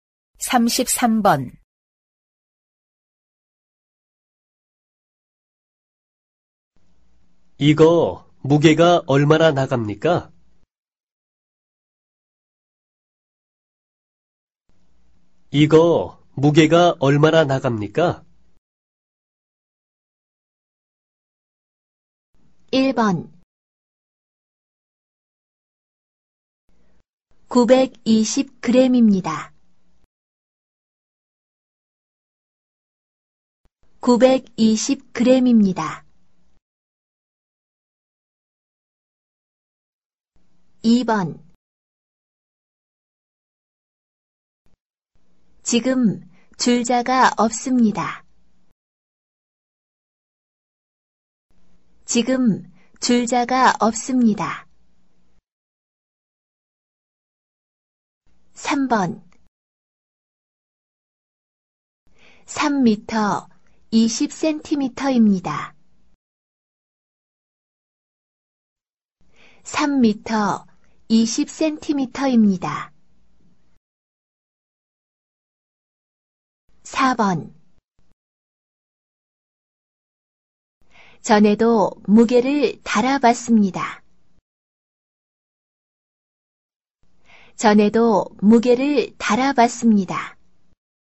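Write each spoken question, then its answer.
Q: 이거 무게가 얼마나 나갑니까?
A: 1: 920g입니다.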